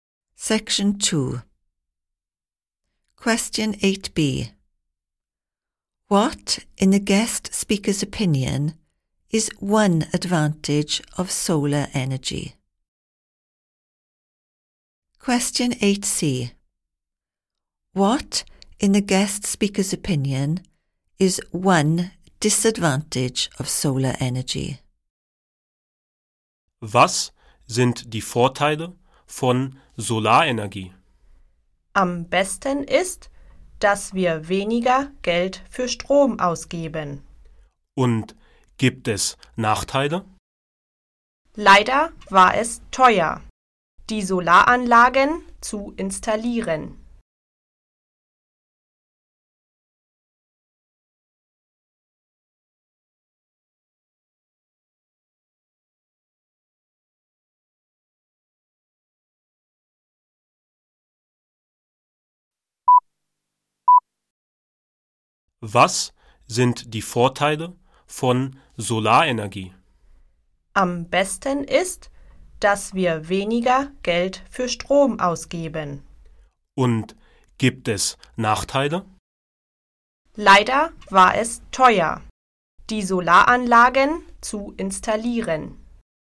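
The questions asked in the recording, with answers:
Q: What, in the guest speaker's opinion, is one advantage of solar energy?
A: They spend less money on electricity

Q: What, in the guest speaker's opinion, is one disadvantage of solar energy?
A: It was expensive to install the solar panels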